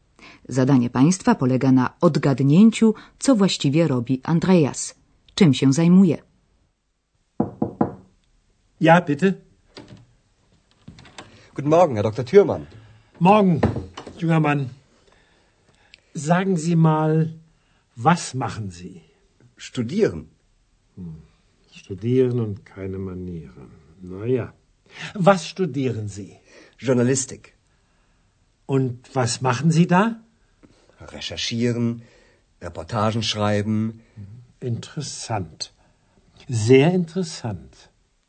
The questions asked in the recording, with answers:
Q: Zadanie Państwa polega na odgadnięciu, co właściwie robi Andreas.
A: Andrea zatem studiuje dziennikarstwo.